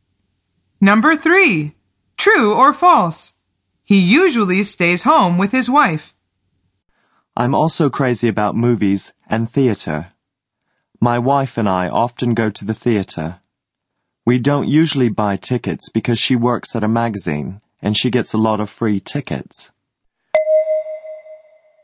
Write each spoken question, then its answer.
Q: True or false? He usually stays home with his wife.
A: The answer is false.